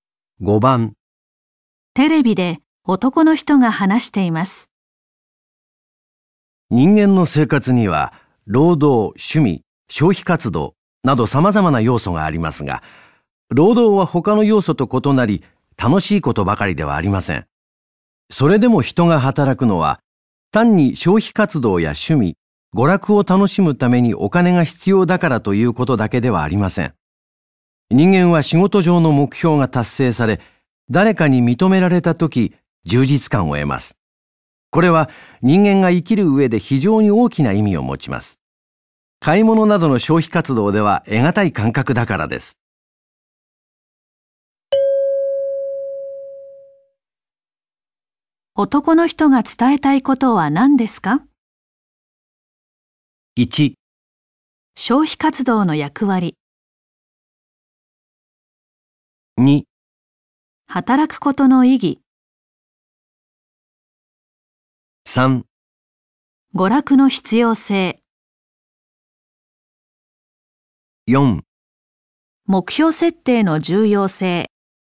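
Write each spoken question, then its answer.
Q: 男の人が伝えたいことは何ですか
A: 2: 働くことの意義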